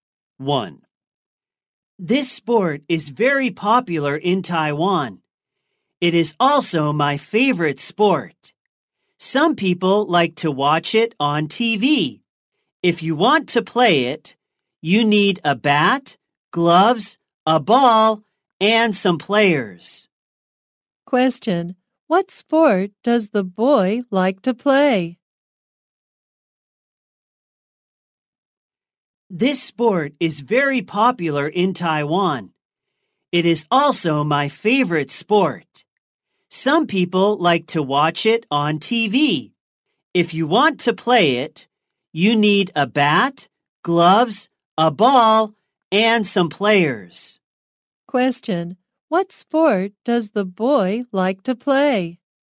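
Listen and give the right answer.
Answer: Baseball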